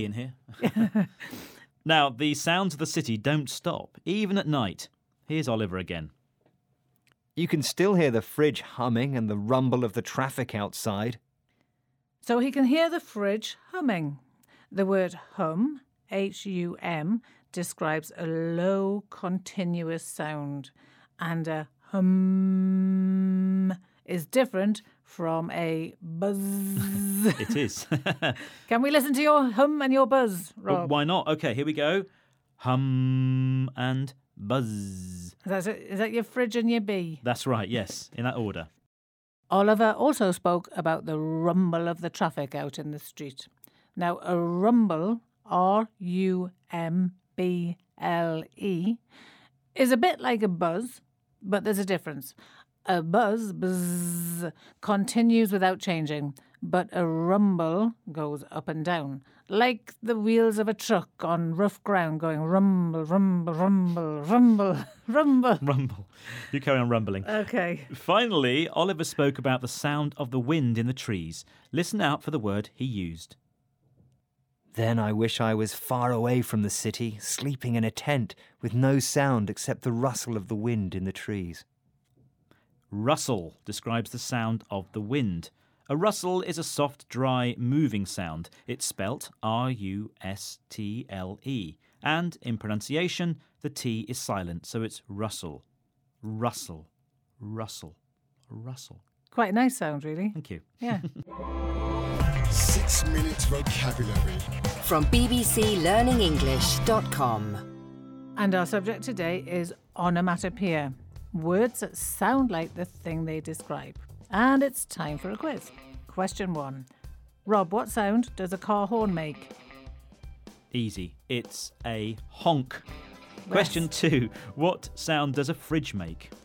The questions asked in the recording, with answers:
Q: What sound does a fridge make?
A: And it's hum.